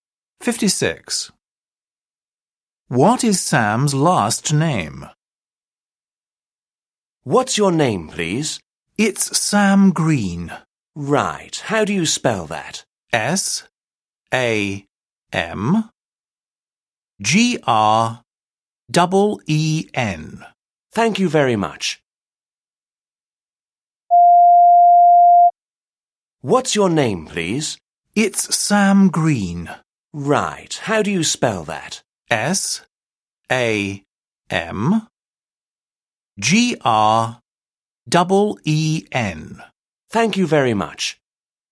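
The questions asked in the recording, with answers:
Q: What is Sam's last name?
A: Green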